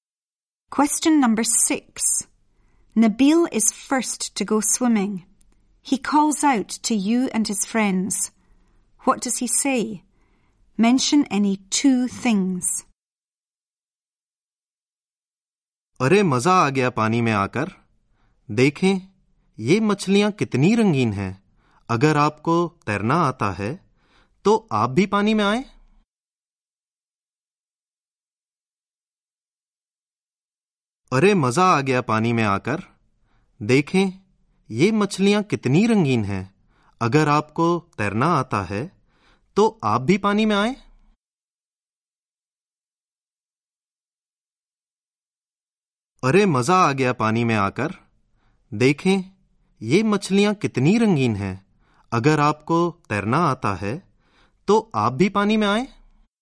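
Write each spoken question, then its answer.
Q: He calls out to you and his friends. What does he say?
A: It's great fun in the water; look how colourful the fish are; if you can swim, come into the water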